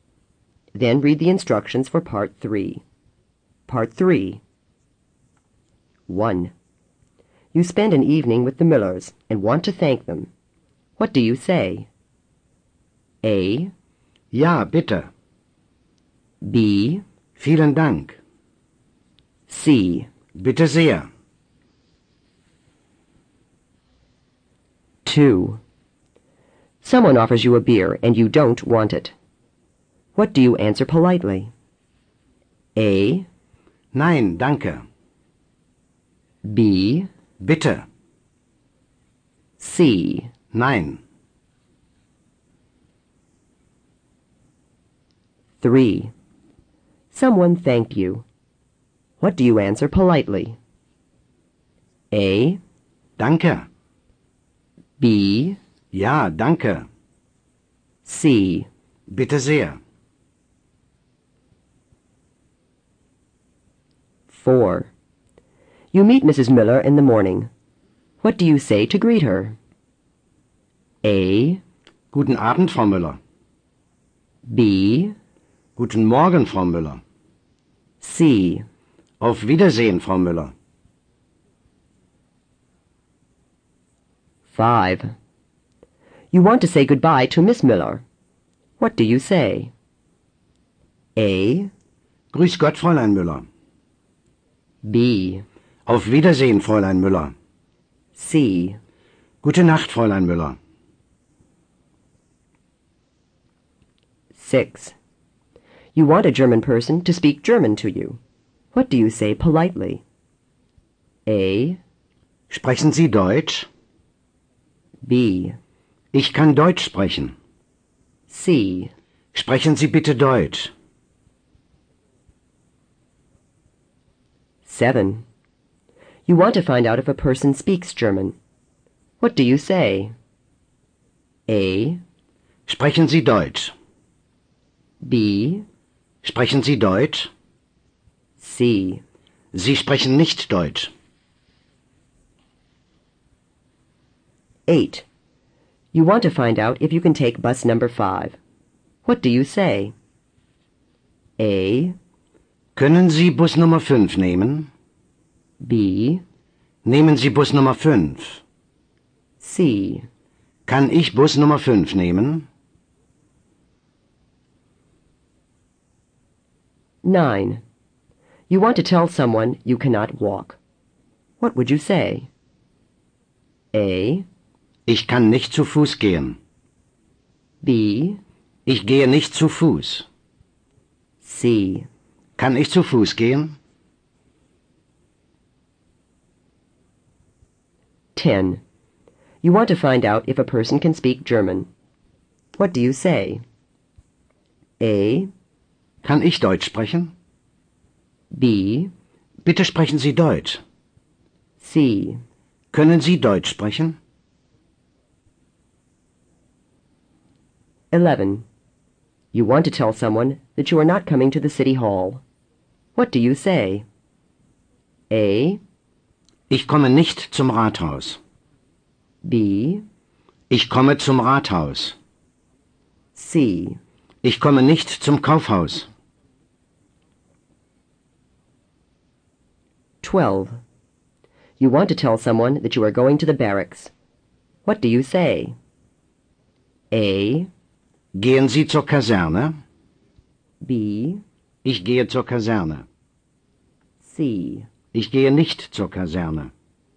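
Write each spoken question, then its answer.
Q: You spend an evening with the Millers and want to thank them. What do you say?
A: B: Vielen Dank.

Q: Someone offers you a beer and you don't want it. What do you answer politely?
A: A: Nein, danke.

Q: Someone thanked you. What do you answer politely?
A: C: Bitte sehr.

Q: You meet Mrs. Miller in the morning. What do you say to greet her?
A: B: Guten Morgen, Frau Müller.

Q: You want to say goodbye to Miss Miller. What do you say?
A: B: Auf Wiedersehen, Fräulein Müller.

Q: You want a German person to speak German to you. What do you say politely?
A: C: Sprechen Sie bitte Deutsch.

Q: You want to find out if you can take bus number 5. What do you say?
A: C: Kann ich Bus Nummer 5 nehmen?

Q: You want to tell someone you cannot walk. What would you say?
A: A: Ich kann nicht zu Fuß gehen.

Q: You want to find out if a person can speak German. 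What do you say?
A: C: Können Sie Deutsch sprechen?

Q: You want to tell someone that you are not coming to the city hall. What do you say?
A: A: Ich komme nicht zum Rathaus.

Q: You want to tell someone that you are going to the barracks. What do you say?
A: B: Ich gehe zur Kaserne.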